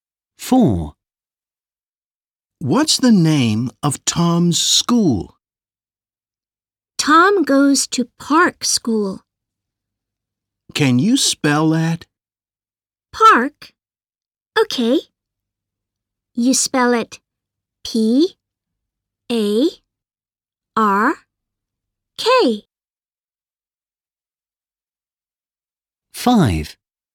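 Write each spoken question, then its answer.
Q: What's the name of Tom's school?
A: Park School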